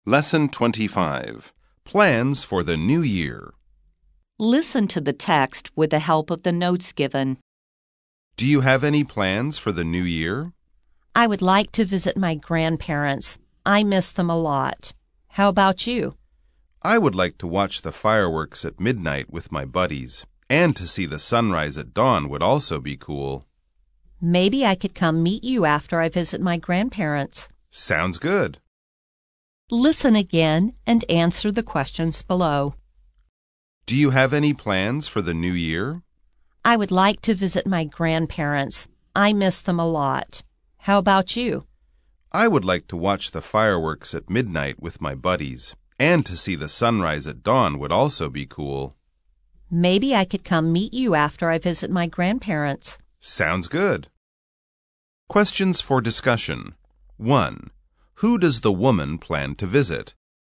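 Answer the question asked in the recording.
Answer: Her grandparents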